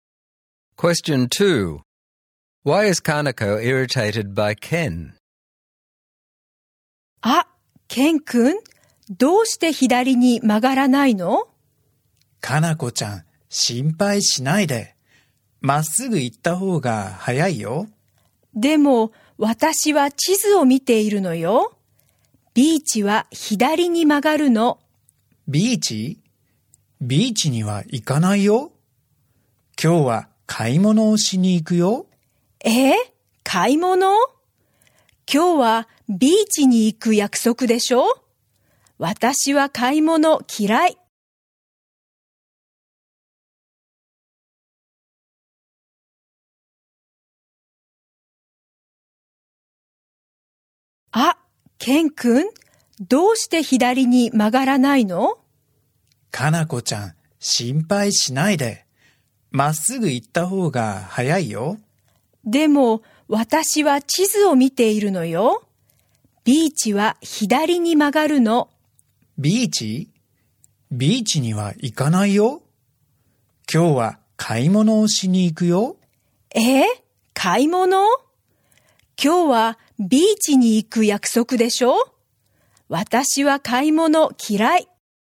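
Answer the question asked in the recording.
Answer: Ken isn't turning left to the beach because he plans to go shopping, although they had agreed to go to the beach, and she hates shopping.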